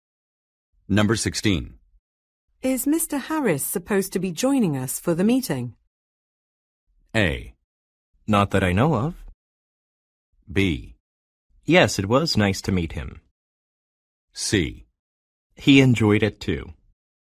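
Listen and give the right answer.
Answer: A: Not that I know of.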